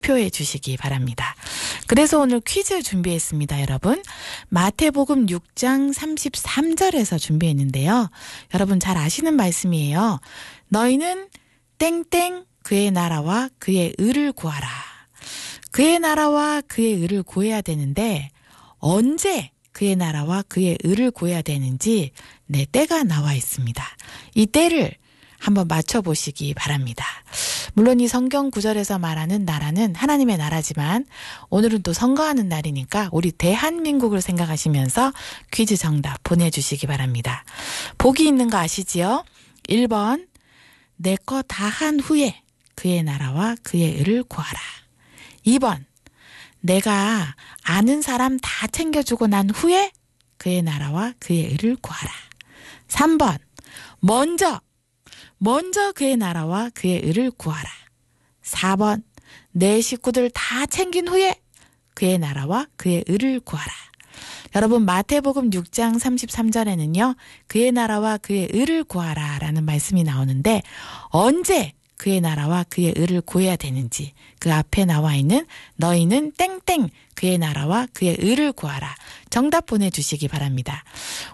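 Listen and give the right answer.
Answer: 3번: 먼저 그의 나라와 그의 의를 구하라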